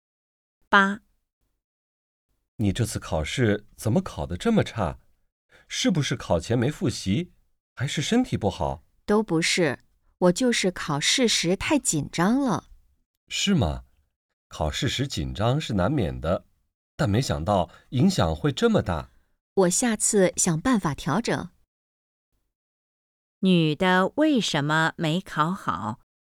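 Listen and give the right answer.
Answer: 考试时太紧张了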